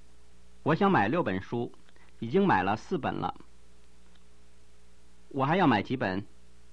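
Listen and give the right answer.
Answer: 两本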